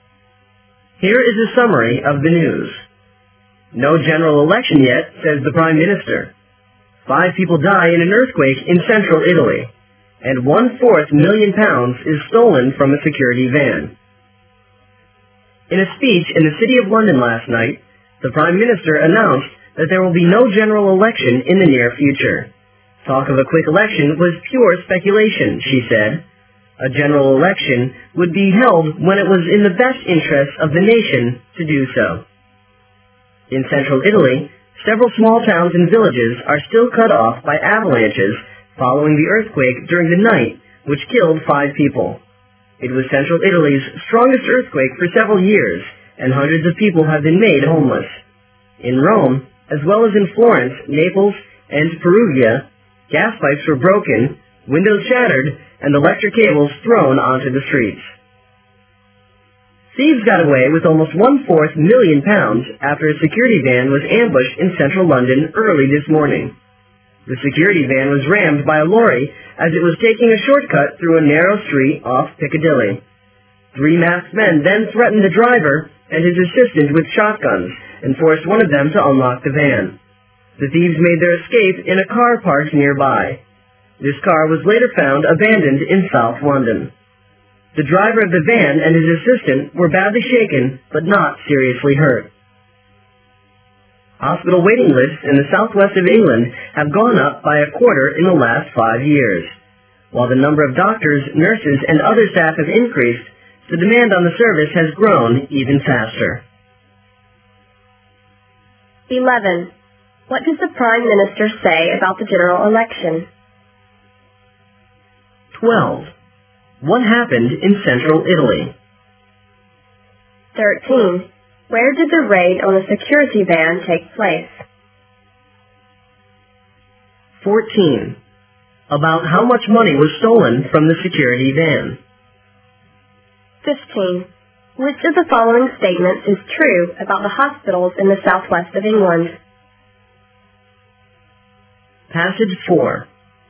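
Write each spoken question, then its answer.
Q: What does the Prime Minister say about the general election?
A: There will be no general election in the near future

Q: What happened in central Italy?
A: An earthquake killed 5 people

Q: Where did the raid on a security van take place?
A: In central London, in a narrow street off Piccadilly

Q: About how much money was stolen from the security van?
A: Almost a quarter of a million pounds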